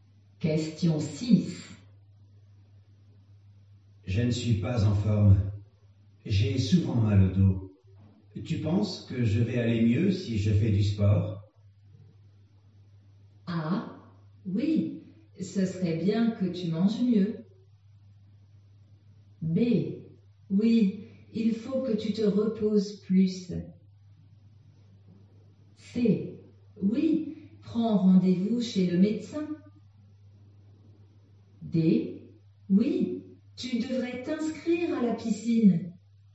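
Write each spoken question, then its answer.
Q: Tu penses que je vais aller mieux si je fais du sport?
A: D: Oui, tu devrais t'inscrire à la piscine.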